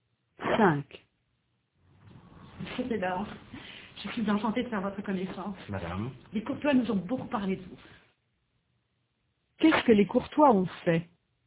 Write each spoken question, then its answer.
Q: Qu'est-ce que les Courtois ont fait?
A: Ils ont beaucoup parlé de Robert au Bello.